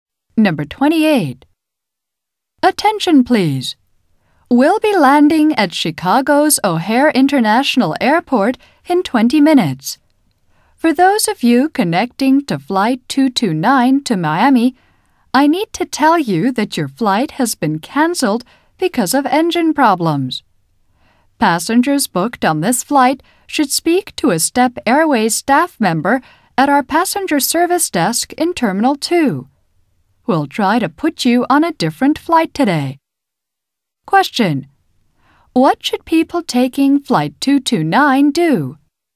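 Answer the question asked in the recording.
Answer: Speak to a Step Airways staff member at the passenger service desk in Terminal 2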